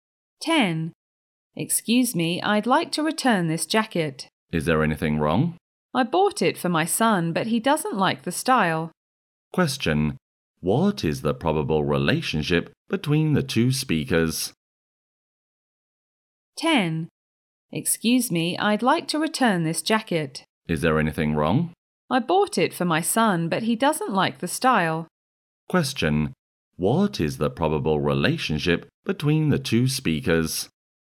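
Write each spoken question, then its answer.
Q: What is the probable relationship between the two speakers?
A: Shop assistant and customer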